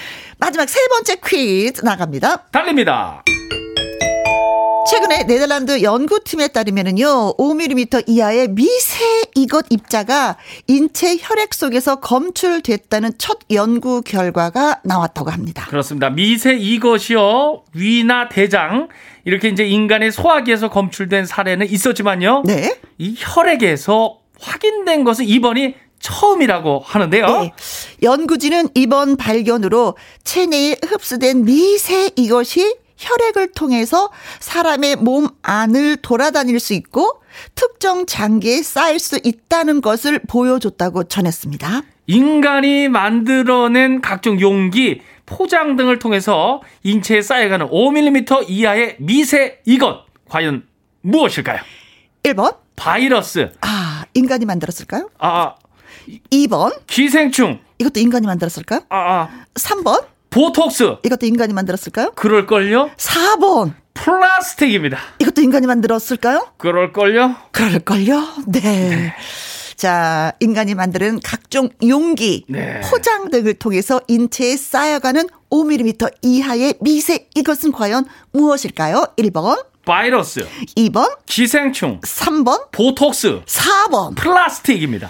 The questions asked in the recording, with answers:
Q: 인간이 만들어낸 각종 용기, 포장 등을 통해서 인체에 쌓여가는 5mm 이하의 미세 이것 과연 무엇일까요?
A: 그래서 정답은 4번. 플라스틱이 정답입니다.